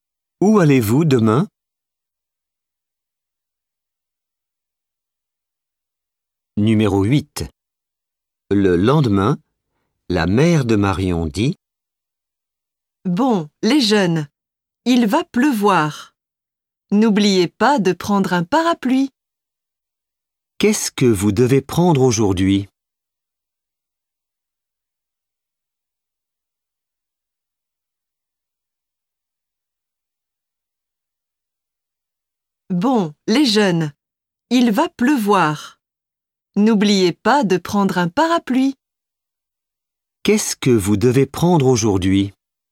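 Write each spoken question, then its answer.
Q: Qu'est-ce que vous devez prendre aujourd'hui?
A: Un parapluie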